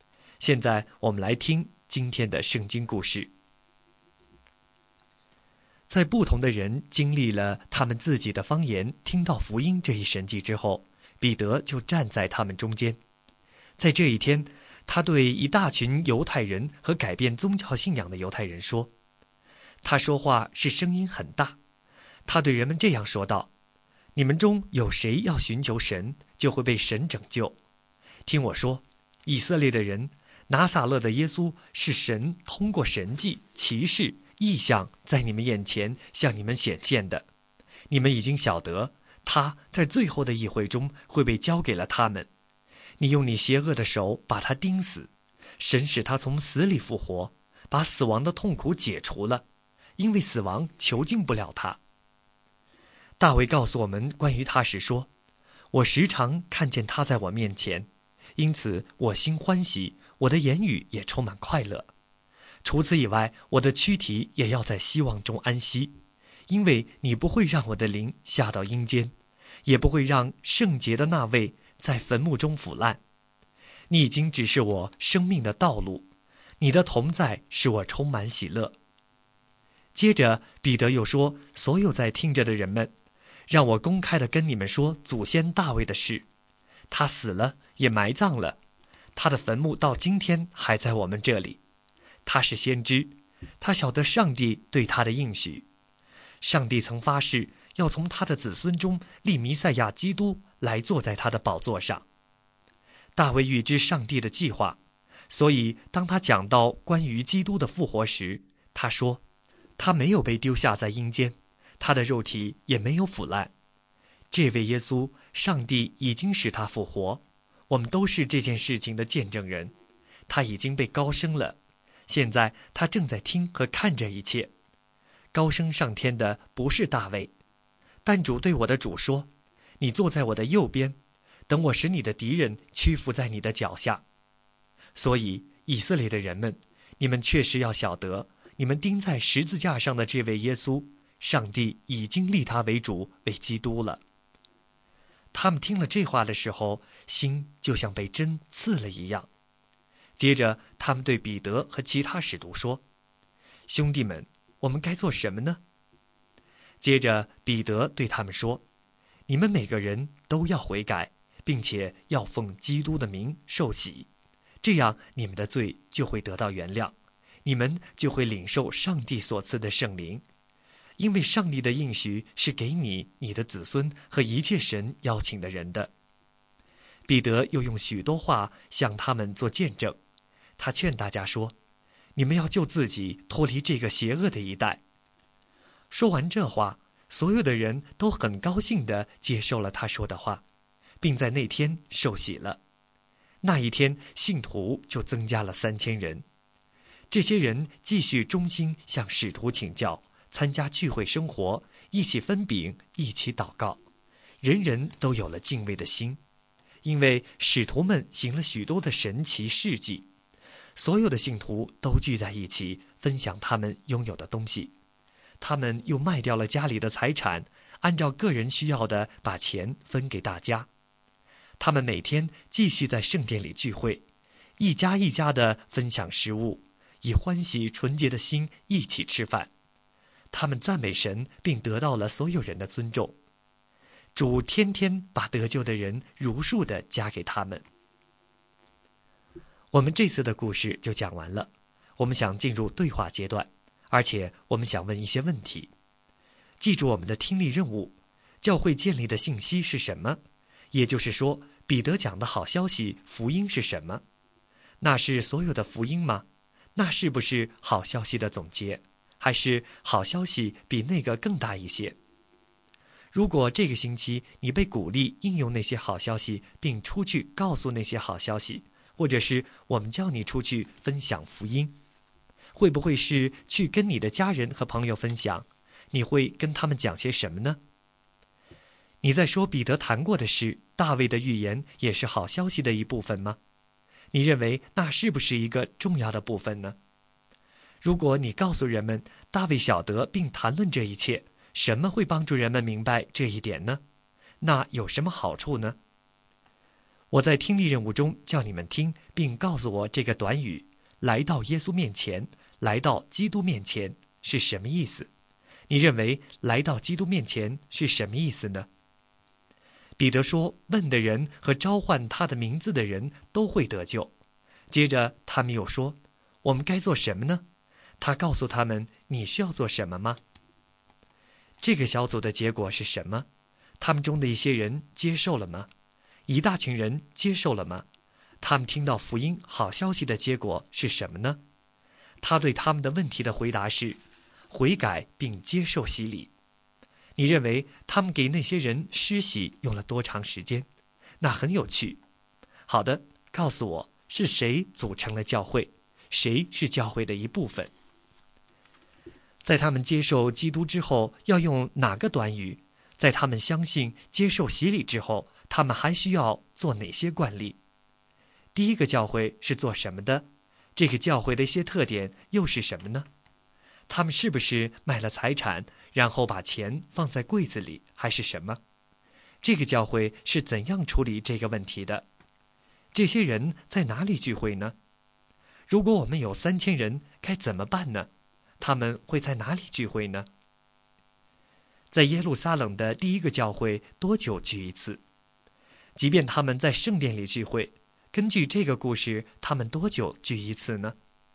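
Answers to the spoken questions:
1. 卖掉财产,按照个人需要把钱分给大家
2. 在圣殿里,也一家一家地聚会
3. 每天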